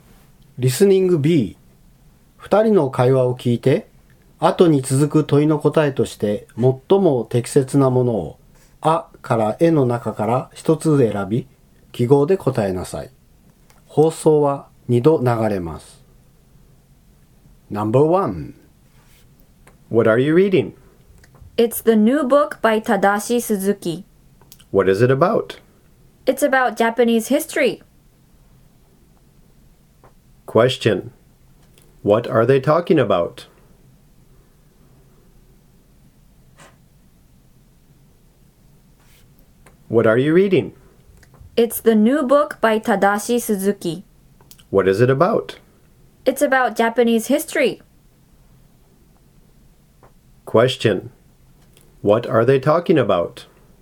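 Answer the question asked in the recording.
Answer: A book about Japanese history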